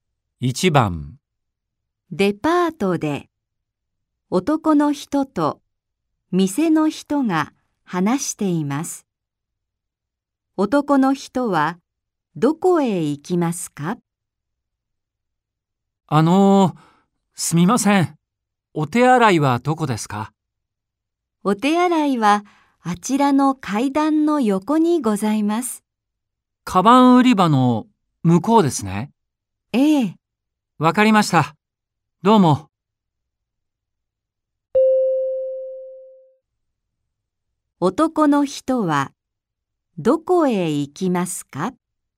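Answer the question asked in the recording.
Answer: お手洗い(階段の横)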